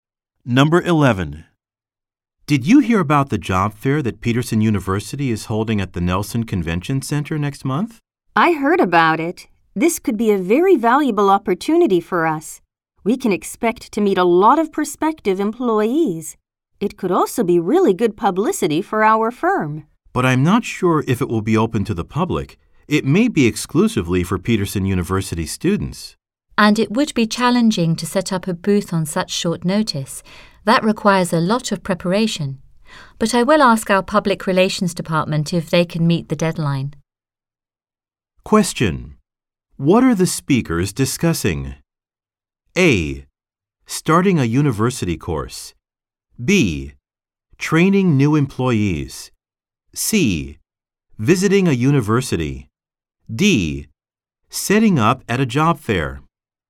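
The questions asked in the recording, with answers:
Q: What are the speakers discussing?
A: D: Setting up at a job fair.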